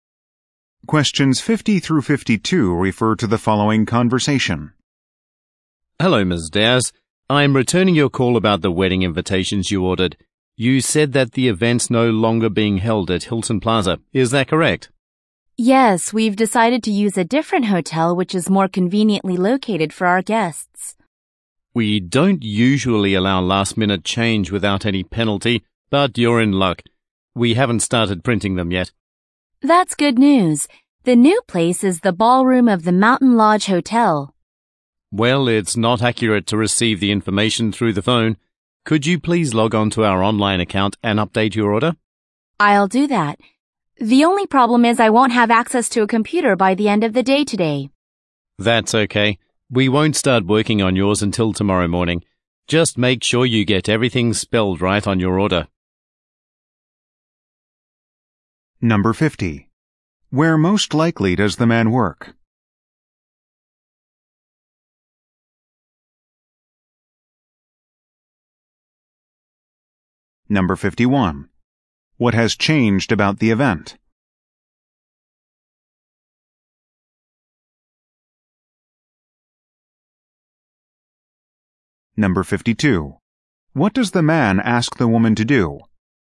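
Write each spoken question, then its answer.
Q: Where most likely does the man work?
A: At a printing company

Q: What has changed about the event?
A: The location

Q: What does the man ask the woman to do?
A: Update her order online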